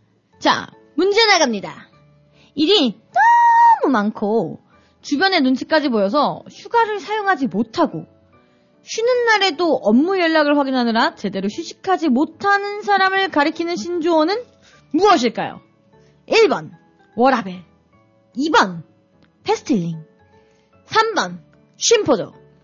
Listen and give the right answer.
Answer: 바로 3번. 심포적입니다.